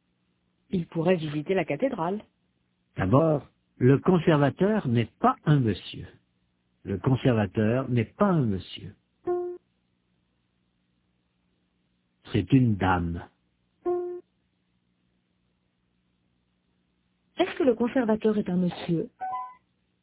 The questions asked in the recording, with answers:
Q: Est-ce que le conservateur est un monsieur?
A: Non, c'est une dame.